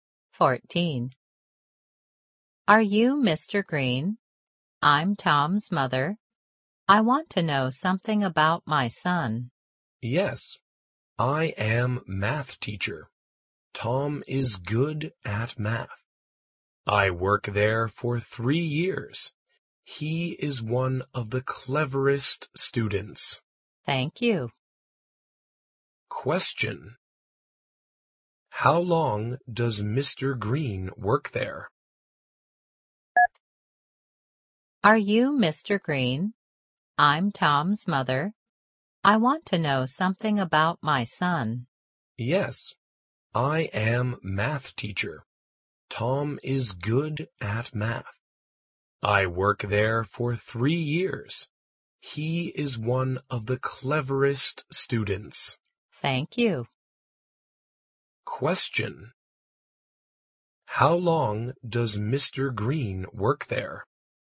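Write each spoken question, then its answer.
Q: How long does Mr. Green work there?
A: For 3 years.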